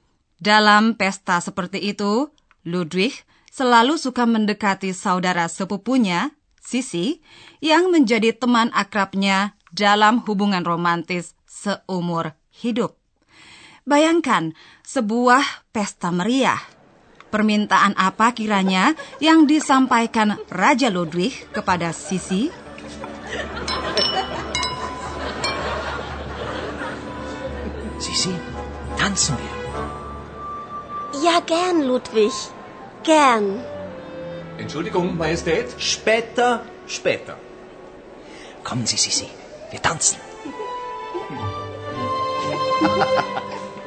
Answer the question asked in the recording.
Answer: Ludwig meminta agar Sisi yang cantik, yang di kemudian hari menjadi ratu Austria, berdansa dengannya.